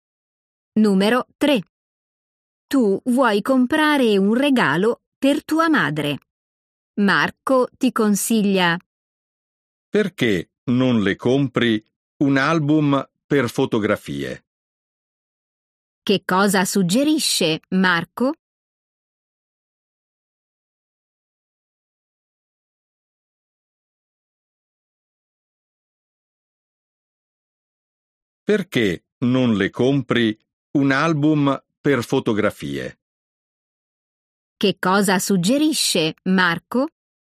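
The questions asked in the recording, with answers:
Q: Che cosa suggerisce Marco?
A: un album per fotografie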